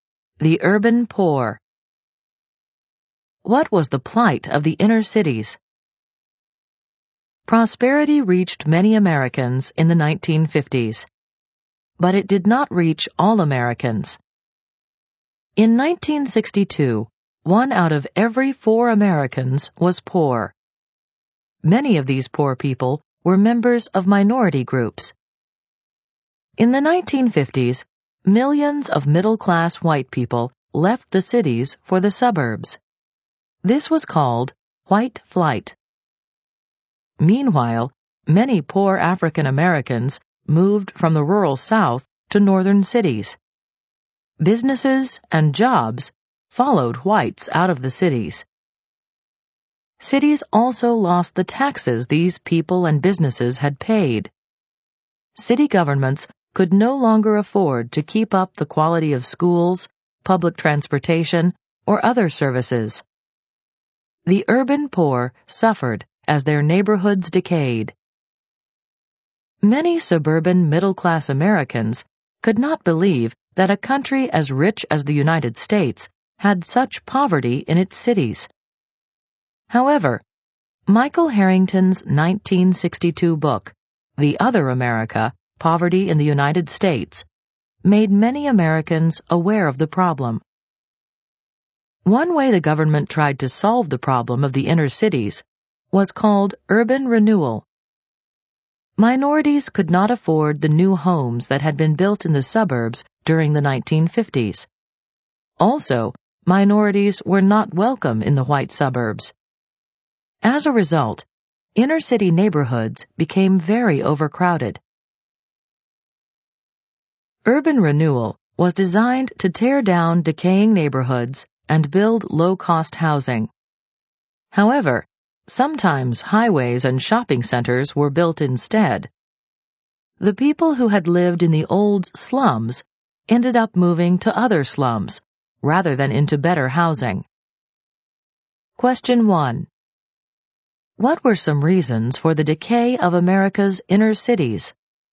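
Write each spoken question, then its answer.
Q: What were some reasons for the decay of America's inner cities?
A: Middle-class whites left for the suburbs (white flight), taking businesses, jobs and taxes with them, so cities couldn't keep up schools, transportation and services; poor minorities crowded into inner cities, and urban renewal often built highways and shopping centers instead of housing.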